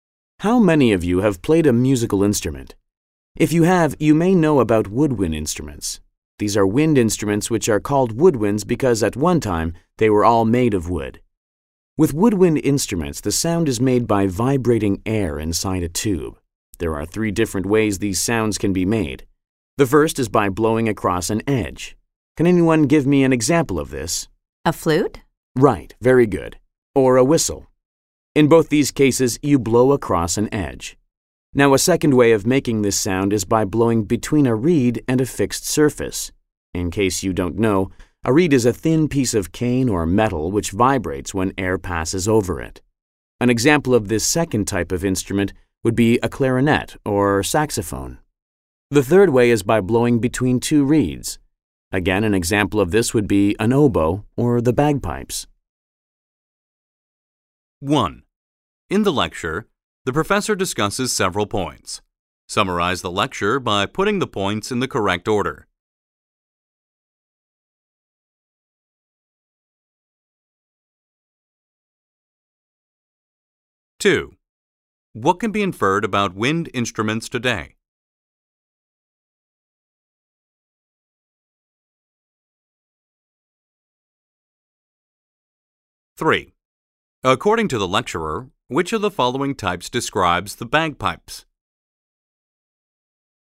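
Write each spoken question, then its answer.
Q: What can be inferred about wind instruments today?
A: Not all of them are made of wood

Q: According to the lecturer, which of the following types describes the bagpipes?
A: Blowing between two reeds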